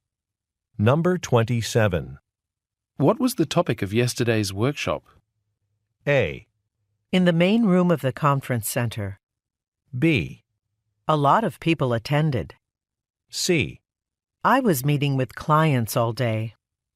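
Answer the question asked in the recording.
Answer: C: I was meeting with clients all day.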